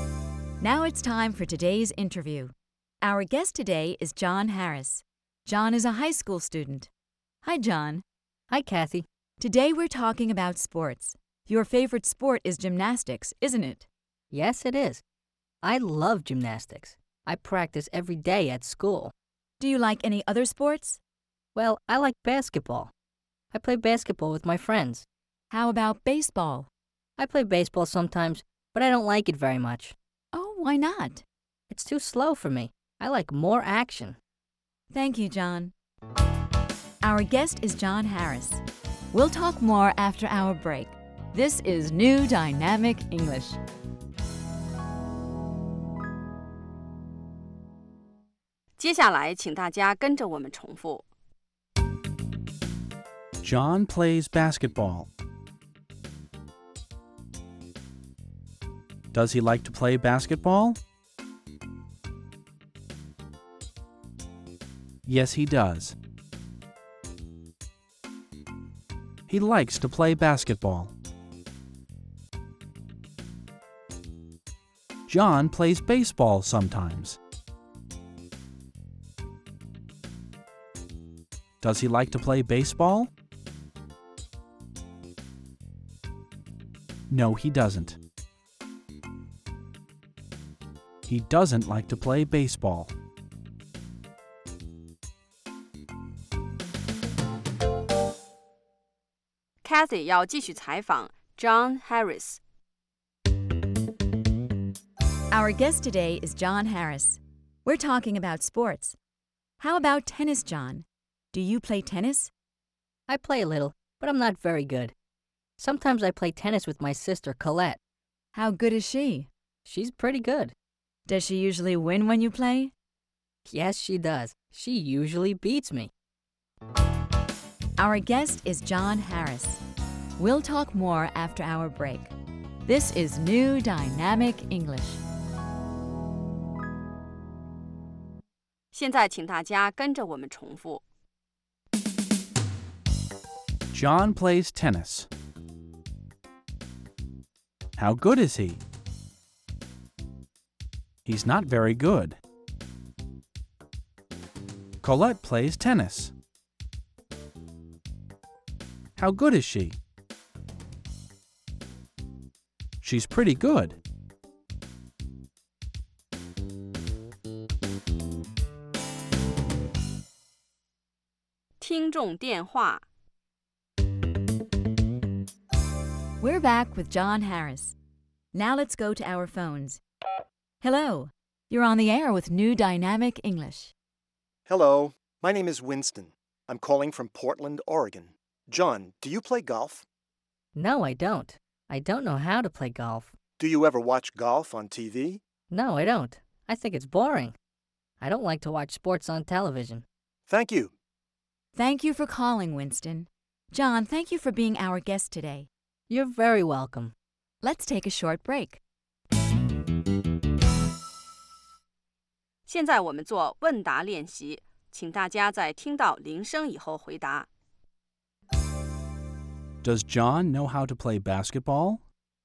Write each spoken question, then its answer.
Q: Does John know how to play basketball?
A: Yes, he does. He knows how to play basketball.